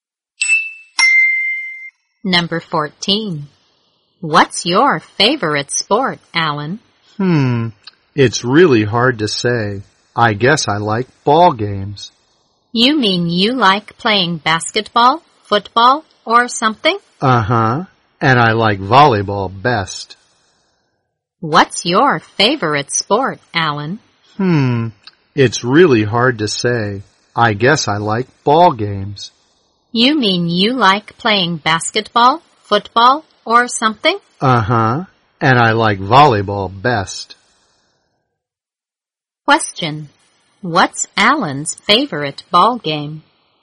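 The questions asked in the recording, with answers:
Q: What's Alan's favorite ball game?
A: Volleyball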